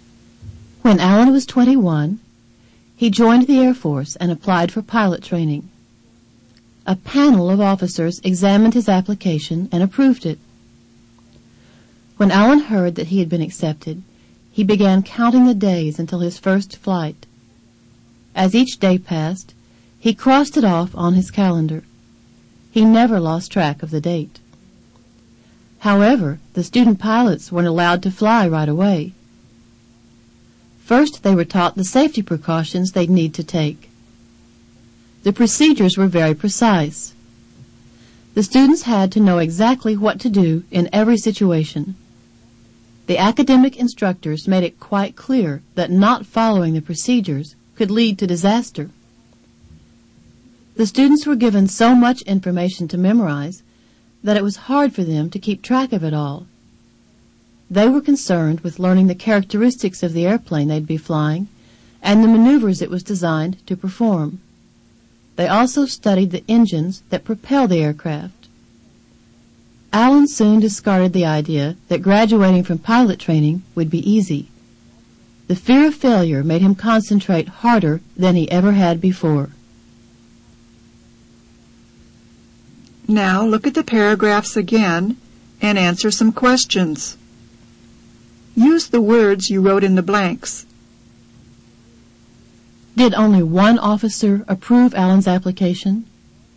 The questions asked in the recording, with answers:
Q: Did only one officer approve Alan's application?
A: No, a panel of officers approved it.